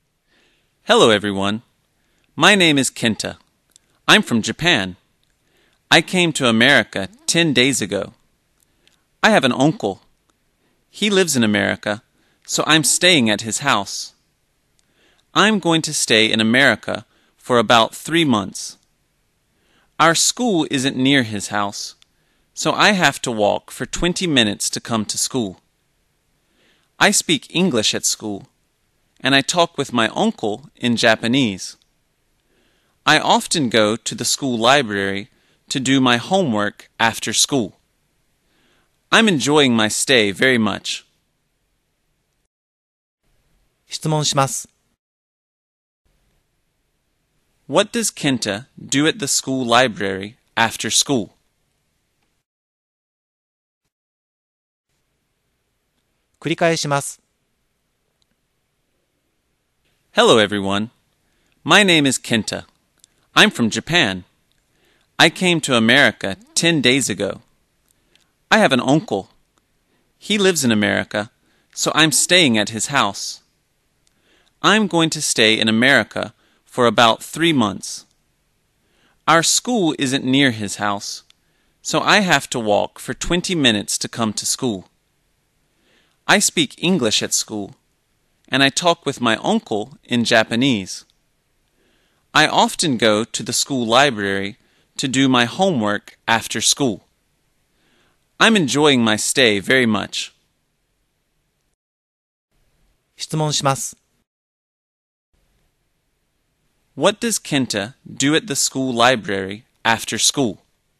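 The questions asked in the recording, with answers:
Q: What does Kenta do at the school library after school?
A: He does his homework.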